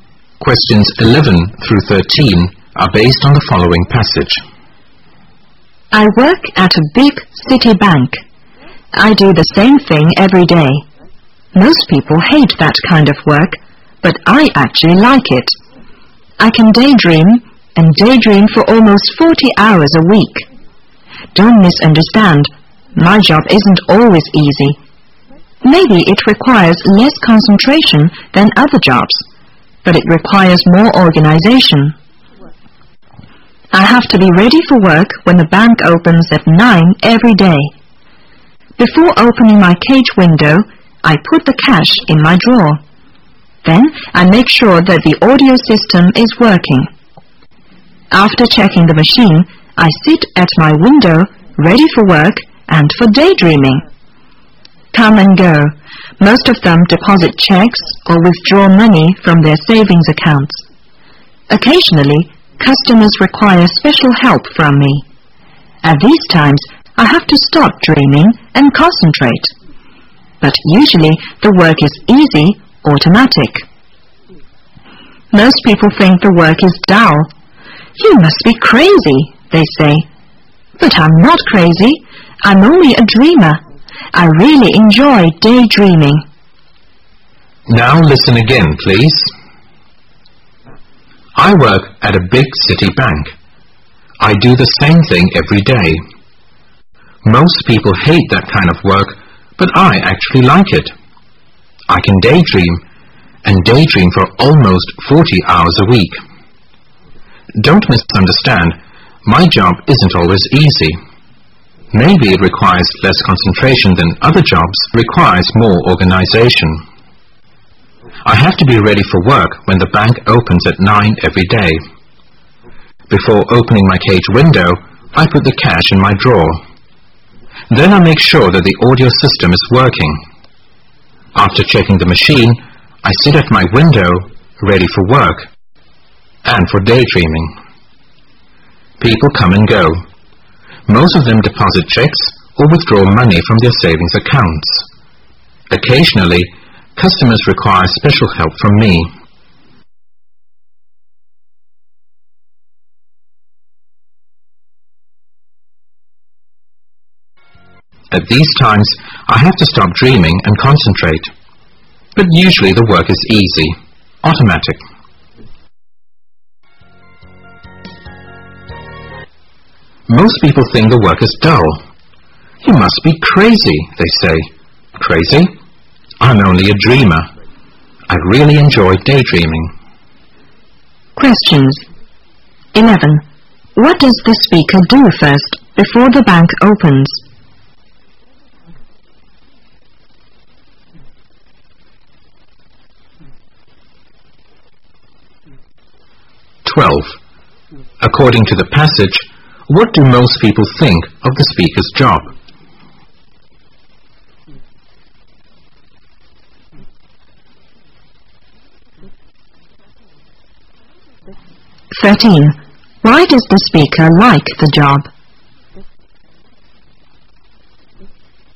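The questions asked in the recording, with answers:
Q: What does the speaker do first before the bank opens?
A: Puts the cash in the drawer

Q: According to the passage, what do most people think of the speaker's job?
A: It is dull

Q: Why does the speaker like the job?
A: He can daydream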